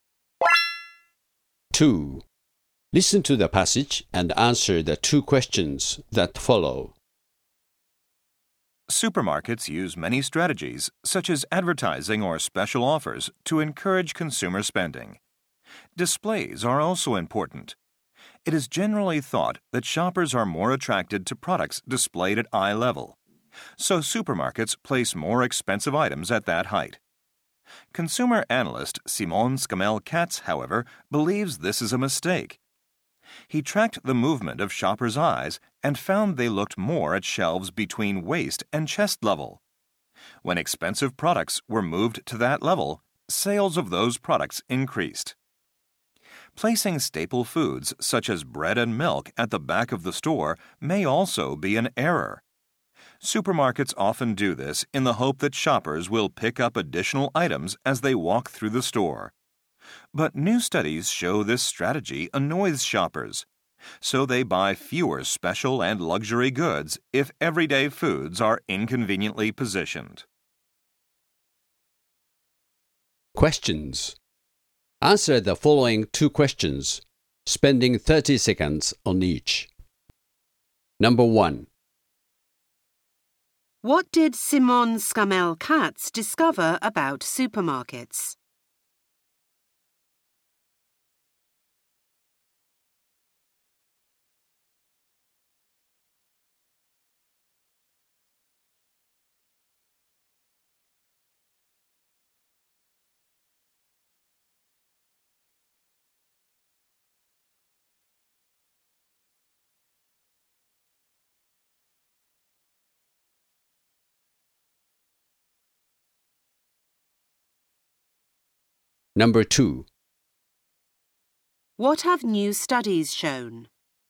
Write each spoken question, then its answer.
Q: What did Simon Scamel Katz discover about supermarkets?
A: He discovered that contrary to previous belief, Shoppers actually scan shelves in the area between the level of their waist and chest.

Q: What have new studies shown?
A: New studies have shown that the strategy of placing frequently used items at the back of the store actually irritates shoppers, leading to a decrease in the purchase of more specialized commodities.